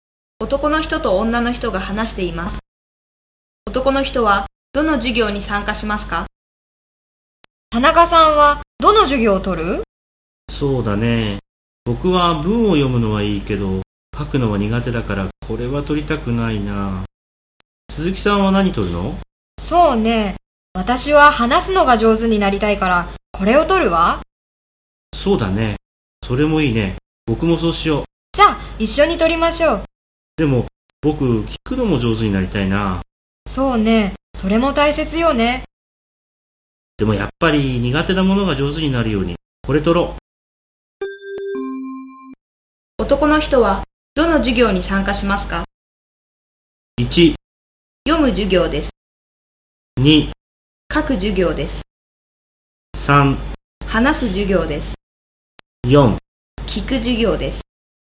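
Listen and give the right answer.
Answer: 2: 書く授業です。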